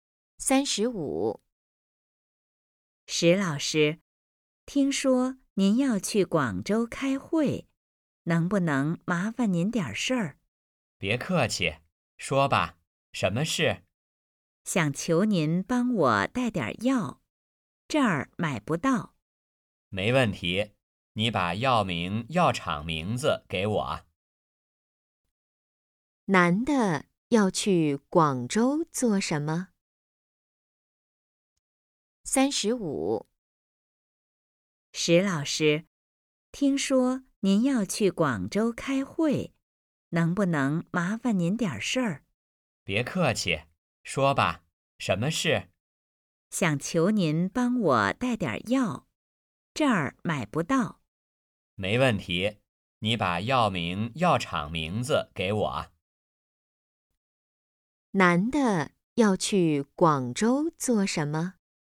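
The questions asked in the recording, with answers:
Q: 男的要去广州做什么?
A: 开会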